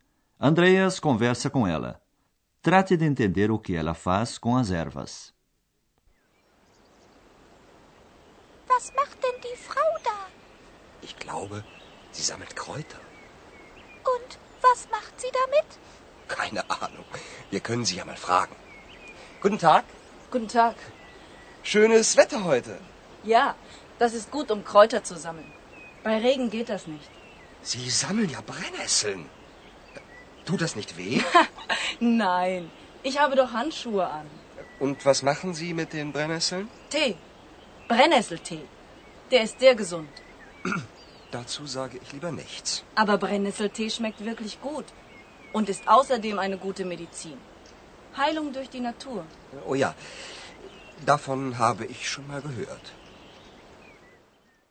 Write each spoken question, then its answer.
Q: Trate de entender o que ela faz com as ervas.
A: Andreas fica então sabendo que a velhinha faz chá de urtiga.